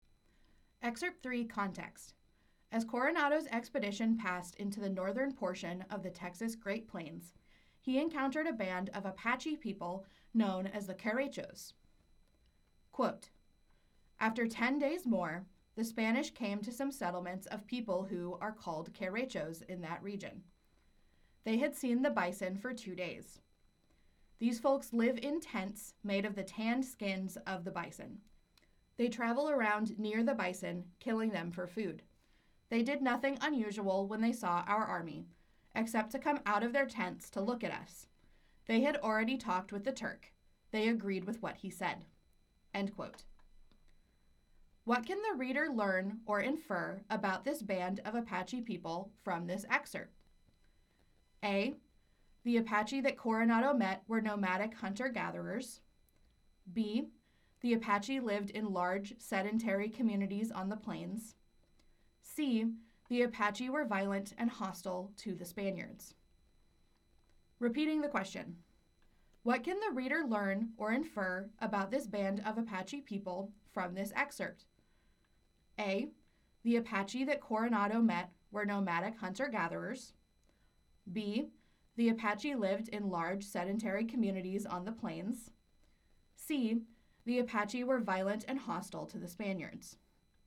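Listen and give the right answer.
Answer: A: The Apache that Coronado met were nomadic hunter-gatherers.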